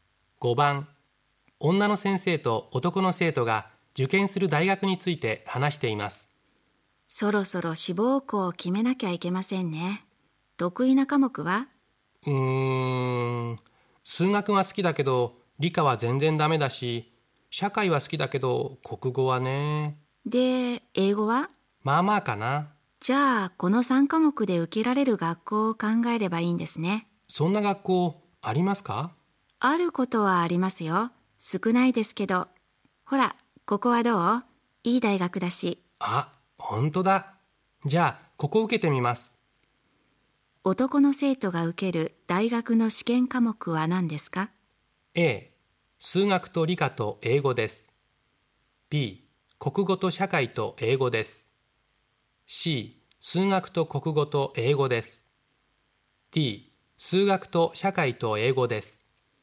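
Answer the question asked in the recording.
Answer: D: 数学と社会と英語です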